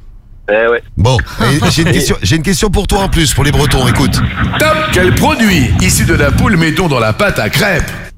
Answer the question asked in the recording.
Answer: L'œuf, c'est ça.